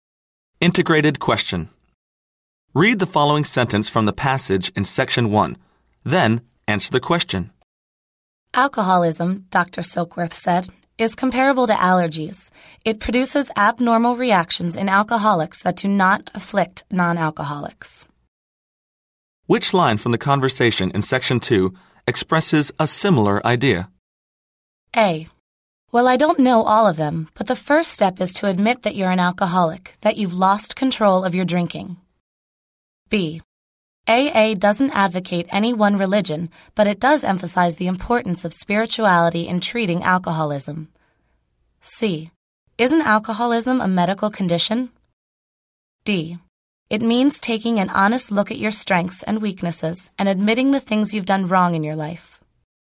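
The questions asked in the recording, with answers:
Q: Which line from the conversation in section 2 expresses a similar idea?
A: C: Isn't alcoholism a medical condition?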